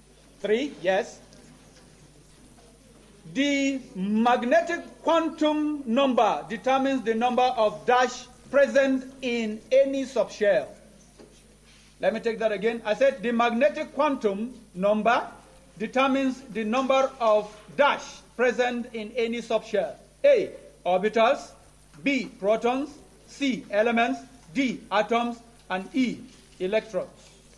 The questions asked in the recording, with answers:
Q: The magnetic quantum number determines the number of dash present in any subshell.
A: orbitals. A round of applause for them, please.